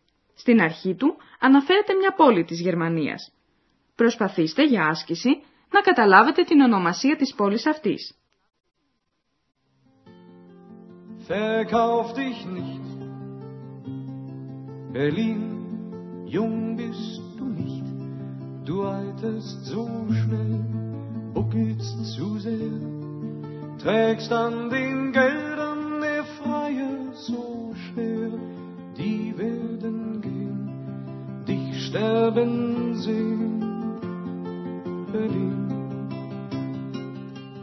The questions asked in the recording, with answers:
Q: Προσπαθήστε για άσκηση να καταλάβετε την ονομασία της πόλης αυτής.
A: Berlin. Berlin.